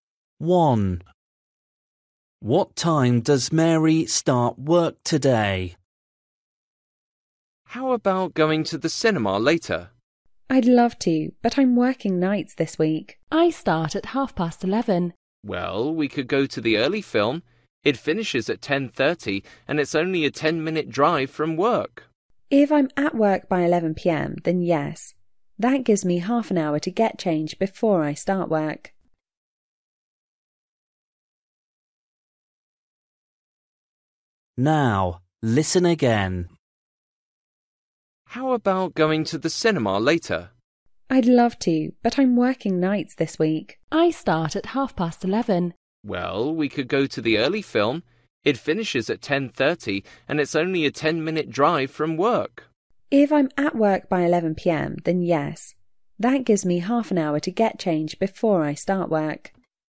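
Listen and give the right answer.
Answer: 11:30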